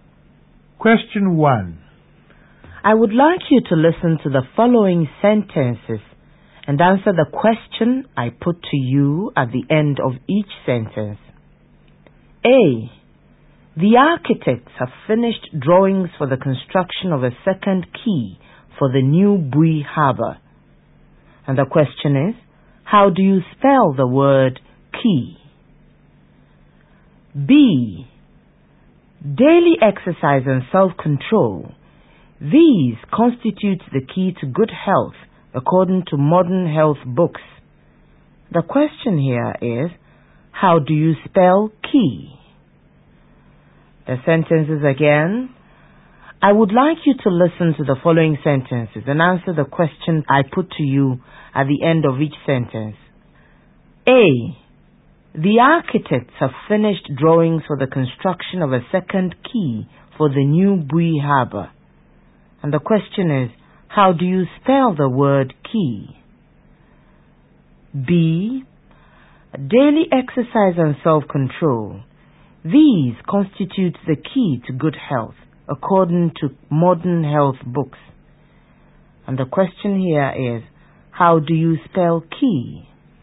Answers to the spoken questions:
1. The word quay is spelled Q-U-A-Y.
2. The word key in this context is spelled K-E-Y.